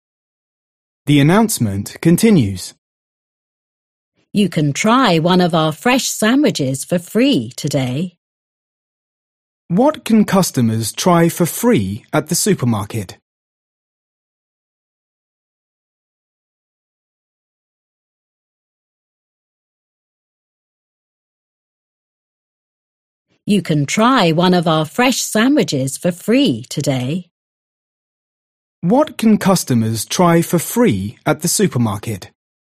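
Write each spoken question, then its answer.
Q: What can customers try for free at the supermarket?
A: a fresh sandwich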